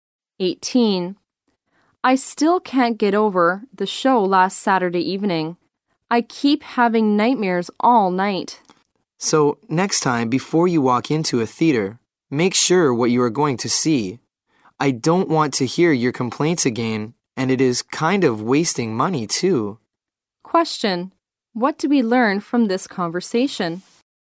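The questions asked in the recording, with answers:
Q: What do we learn from this conversation?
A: The show last Saturday frightened the man and gave him nightmares.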